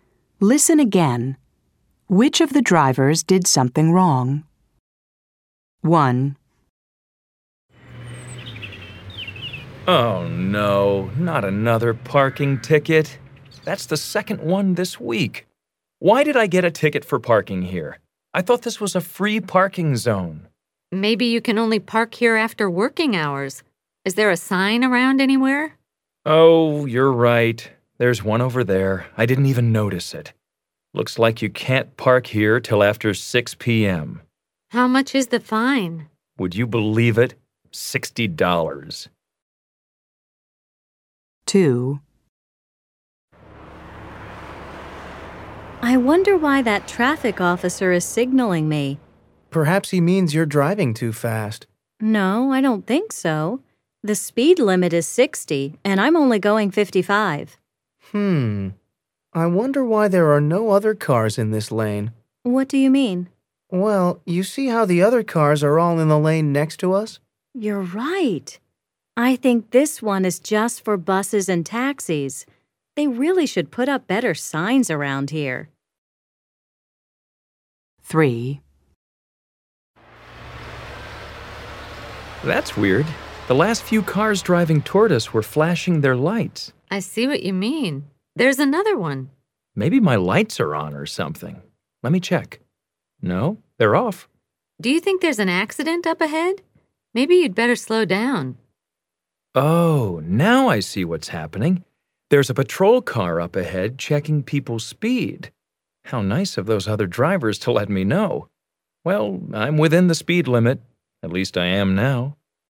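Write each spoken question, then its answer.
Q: Which of the drivers did something wrong?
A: Yes, this driver did something wrong: parked in a no-parking zone before 6 p.m. and got a $60 fine.

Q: Which of the drivers did something wrong?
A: Yes, this driver did something wrong: drove in the bus and taxi lane.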